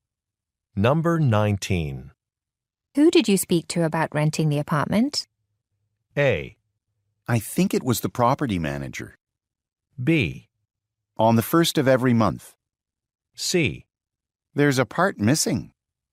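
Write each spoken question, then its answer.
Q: Who did you speak to about renting the apartment?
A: A: I think it was the property manager.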